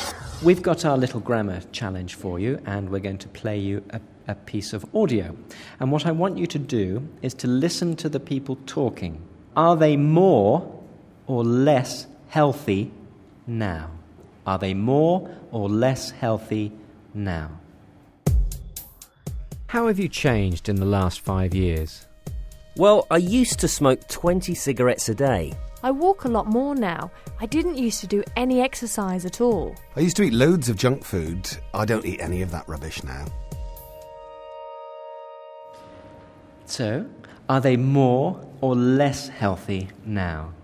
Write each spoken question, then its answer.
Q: So, are they more or less healthy now?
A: Yes, they, because they stopped smoking and stopped eat junk food, so yes, nowadays they are healthy more than before.